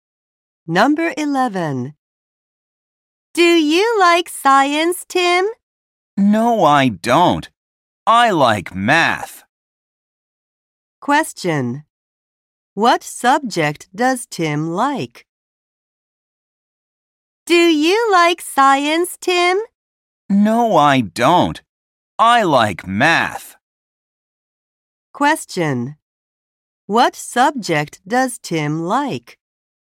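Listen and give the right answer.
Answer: Math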